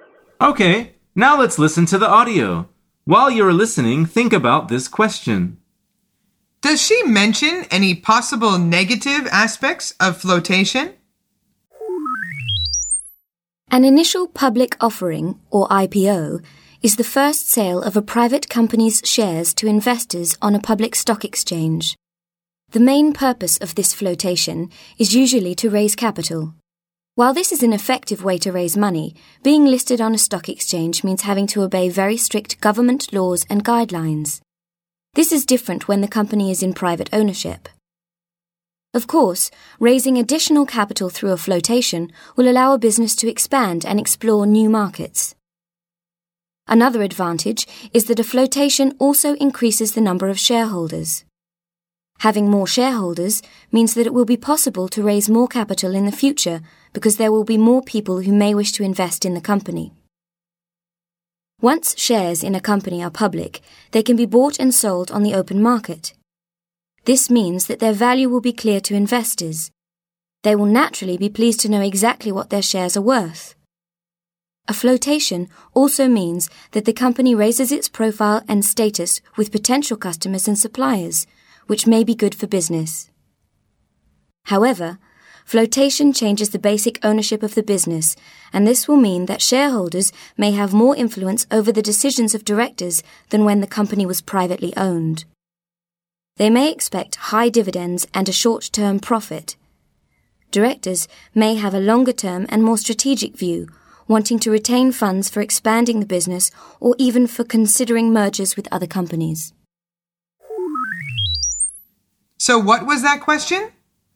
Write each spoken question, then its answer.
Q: Does she mention any possible negative aspects of flotation?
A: The answer is yes, particularly for directors.